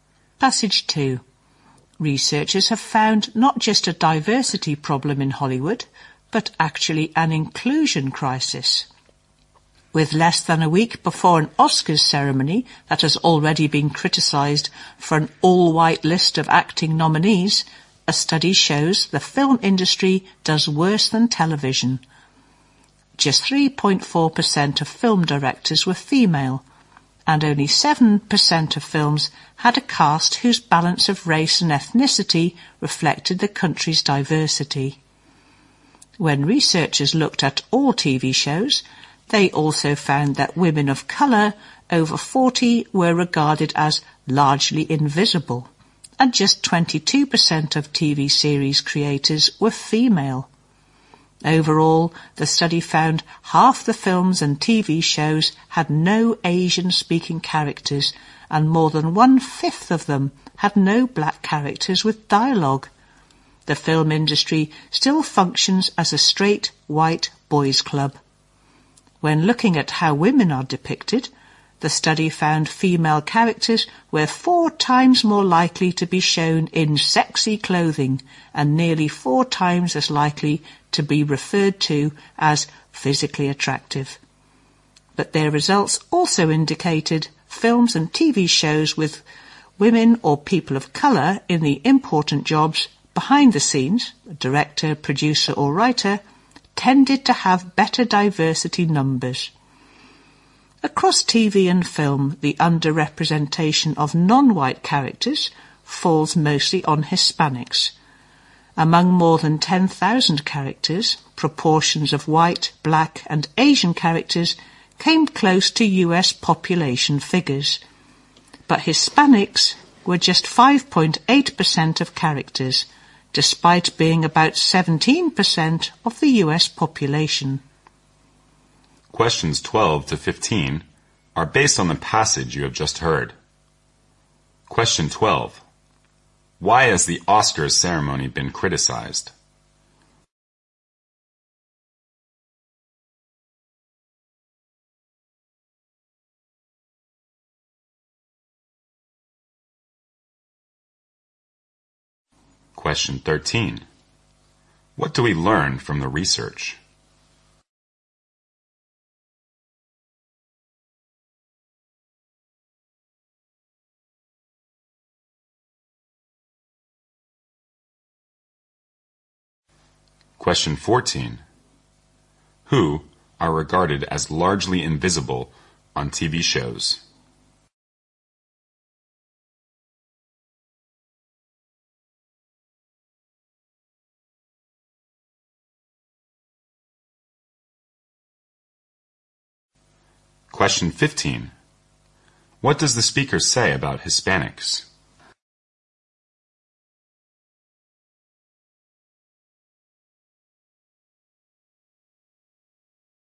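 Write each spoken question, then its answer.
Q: Why has the Oscars ceremony been criticized?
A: All of its acting nominees are white.

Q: Who are regarded as largely invisible on TV shows?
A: Women of colour over 40.

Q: What does the speaker say about Hispanics?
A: They are greatly underrepresented: just 5.8% of characters, though about 17% of the US population.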